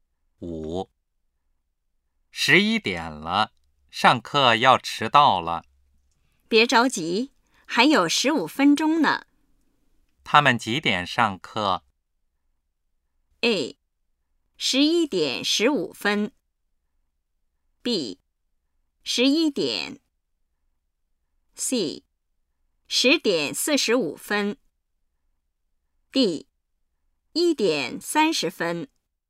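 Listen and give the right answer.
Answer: A:11点15分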